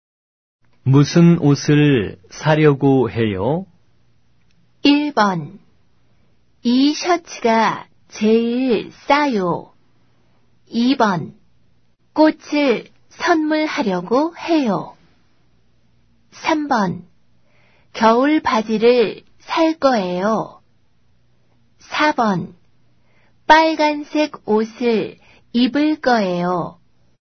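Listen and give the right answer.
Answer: 3: 겨울 바지를 살 거예요.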